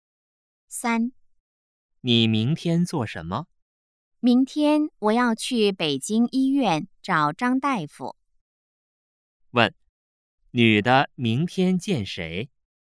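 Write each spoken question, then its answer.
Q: 问,女的明天见谁?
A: 张大夫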